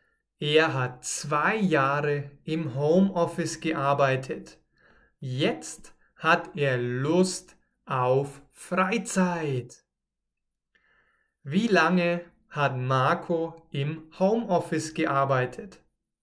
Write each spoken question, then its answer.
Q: Wie lange hat Marco im Homeoffice gearbeitet?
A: Zwei Jahre. Er hat zwei Jahre im Homeoffice gearbeitet.